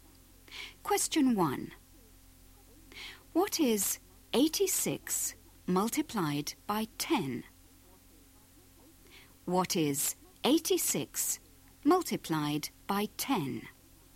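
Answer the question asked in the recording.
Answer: 860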